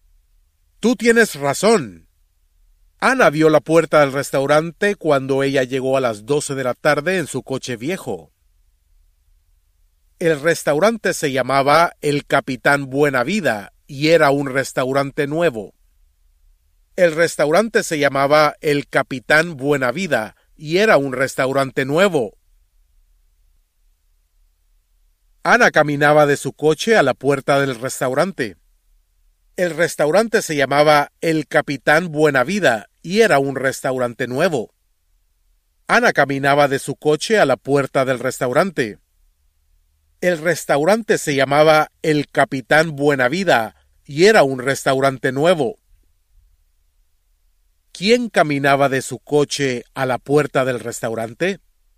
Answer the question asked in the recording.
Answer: Ana caminaba a la puerta del restaurante mexicano.